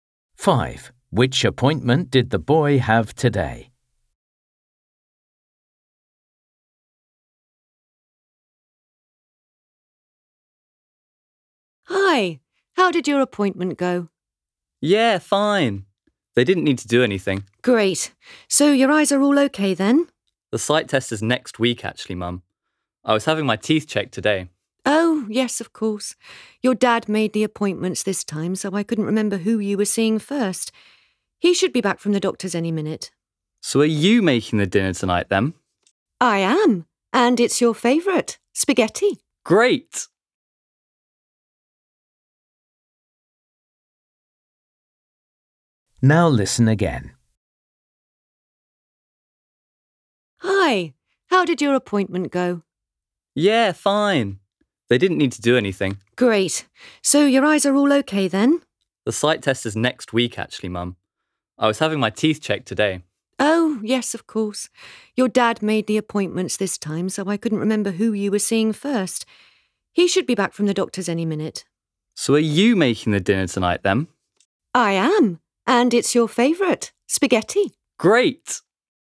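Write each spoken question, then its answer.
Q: Which appointment did the boy have today?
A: the dentist (teeth check)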